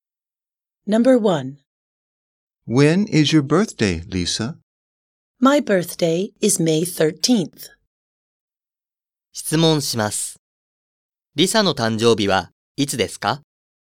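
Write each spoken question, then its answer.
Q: 質問します。 Lisa の誕生日はいつですか?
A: 5月13日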